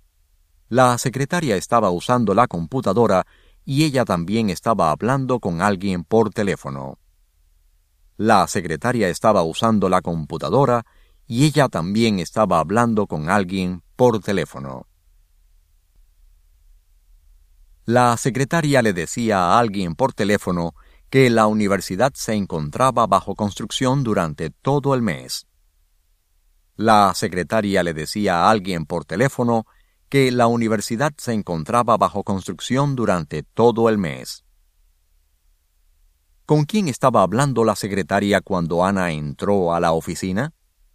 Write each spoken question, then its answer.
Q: ¿Con quién estaba hablando la secretaria cuando Ana entró a la oficina?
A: La secretaria estaba hablando con alguien por teléfono.